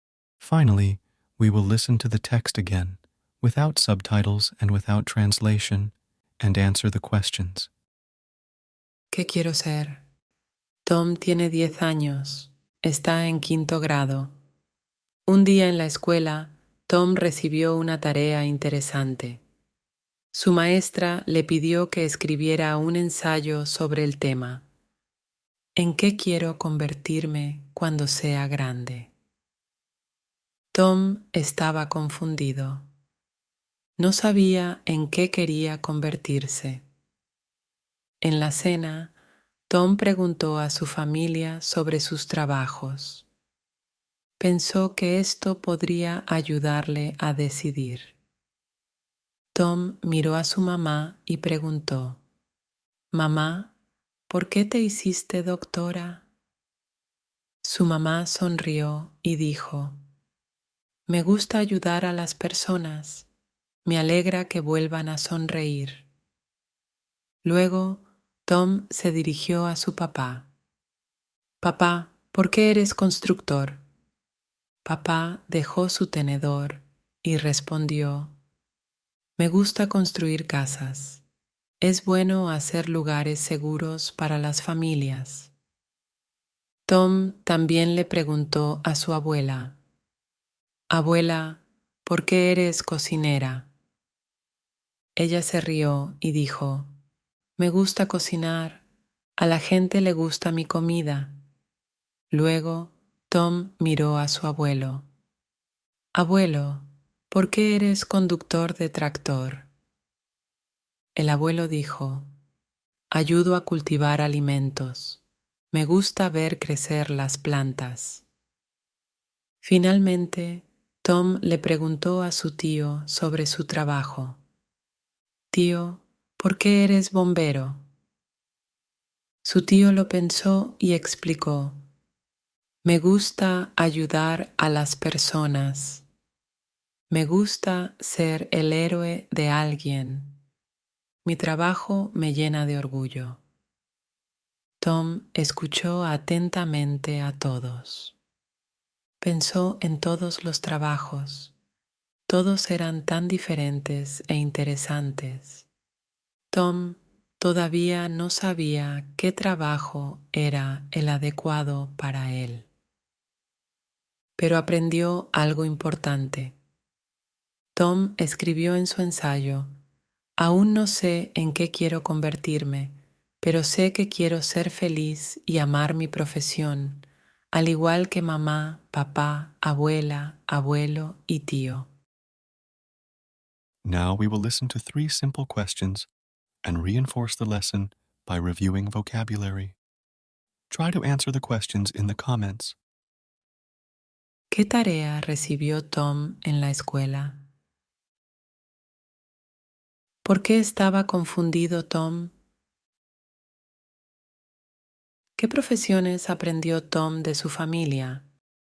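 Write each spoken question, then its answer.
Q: ¿Qué tarea recibió Tom en la escuela?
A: Escribir un ensayo sobre en qué quiere convertirse cuando sea grande

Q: ¿Por qué estaba confundido Tom?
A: No sabía en qué quería convertirse

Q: ¿Qué profesiones aprendió Tom de su familia?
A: Doctora, constructor, cocinera, conductor de tractor y bombero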